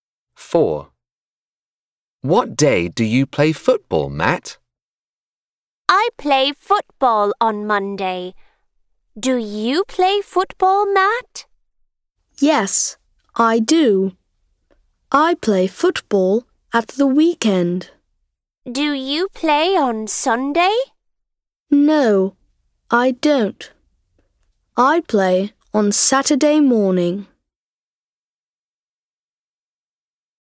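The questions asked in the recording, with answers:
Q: What day do you play football, Matt?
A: Saturday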